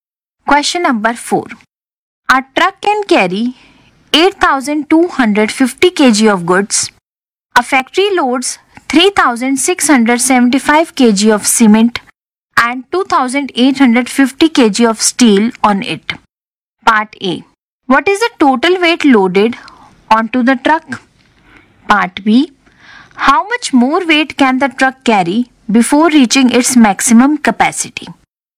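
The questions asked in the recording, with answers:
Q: What is the total weight loaded onto the truck?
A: 6,525 kg

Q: How much more weight can the truck carry before reaching its maximum capacity?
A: 1,725 kg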